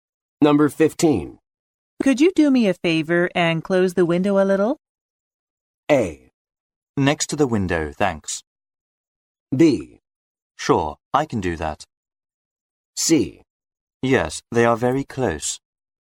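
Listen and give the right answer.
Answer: B: Sure, I can do that.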